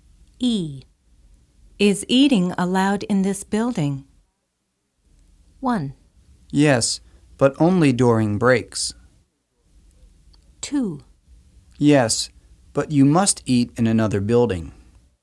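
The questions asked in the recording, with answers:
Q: Is eating allowed in this building?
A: 1: Yes, but only during breaks.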